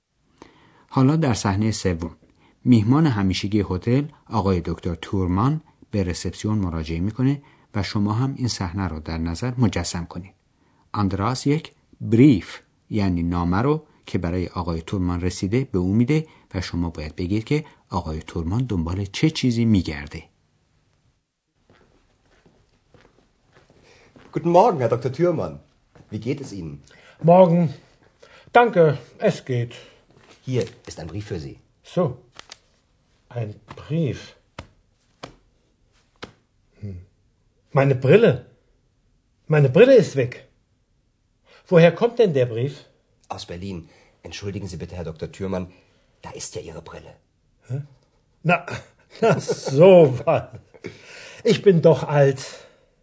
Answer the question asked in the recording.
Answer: ولی برای خواندن احتیاج به بریل یعنی عینک خودش داره، ولی بعد از مدتی جستجو کردن عینک خودش رو پیدا نمی‌کنه